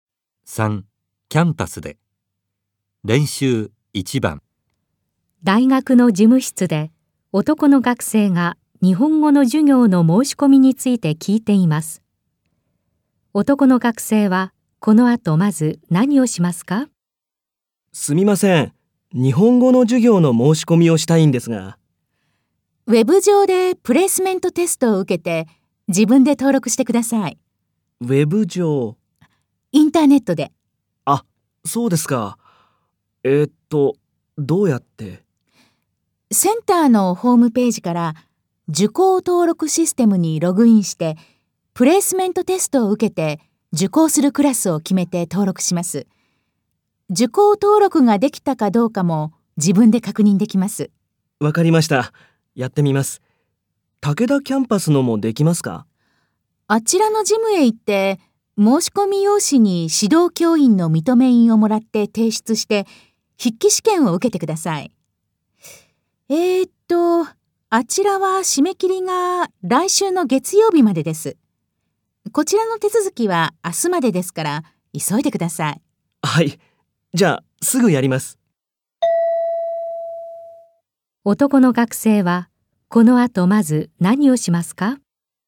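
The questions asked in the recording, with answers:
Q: 男の学生はこの後まず何をしますか?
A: ウェブ上で受講登録システムにログインしてプレイスメントテストを受ける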